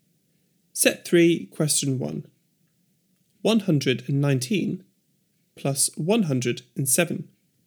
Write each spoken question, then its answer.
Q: 119 plus 107.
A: 226.